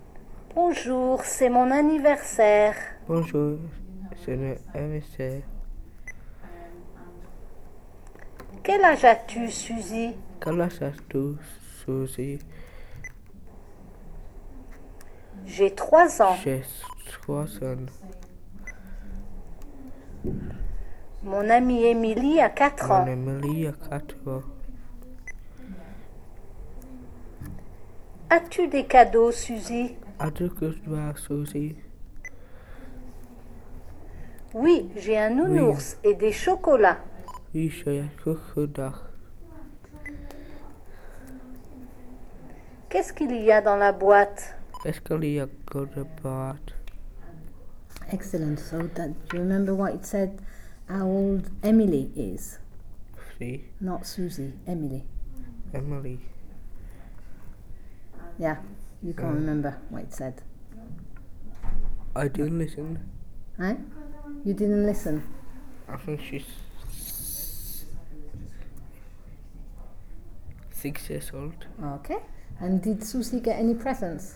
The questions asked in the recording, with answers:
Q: And did Susie get any presents?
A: Yes.